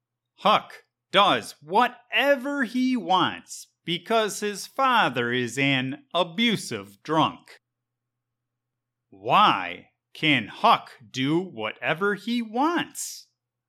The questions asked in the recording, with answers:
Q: Why can Huck do whatever he wants?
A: Huck can do whatever he wants because he is the son of an abusive drunk.